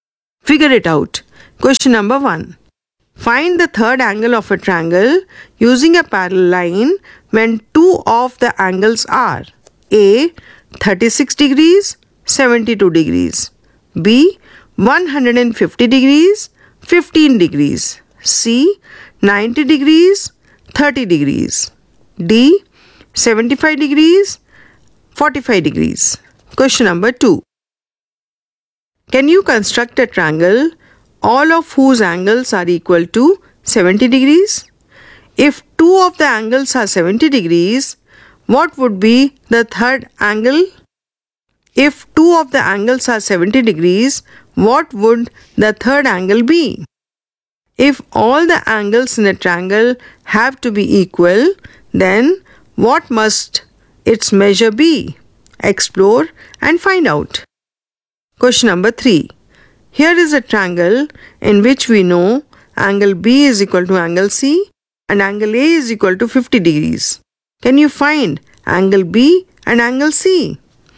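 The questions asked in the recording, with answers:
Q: 36 degrees, 72 degrees.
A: 72 degrees

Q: 150 degrees, 15 degrees.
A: 15 degrees

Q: 90 degrees, 30 degrees.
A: 60 degrees

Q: 75 degrees, 45 degrees.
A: 60 degrees

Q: Can you construct a triangle all of whose angles are equal to 70 degrees?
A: No

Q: If two of the angles are 70 degrees, what would be the third angle?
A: 40 degrees

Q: If all the angles in a triangle have to be equal, then what must its measure be?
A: 60 degrees

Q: Can you find angle B and angle C?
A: Both are 65 degrees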